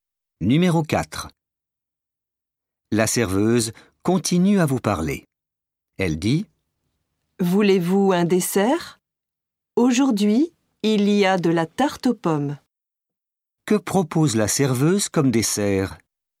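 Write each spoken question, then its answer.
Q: Que propose la serveuse comme dessert?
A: De la tarte aux pommes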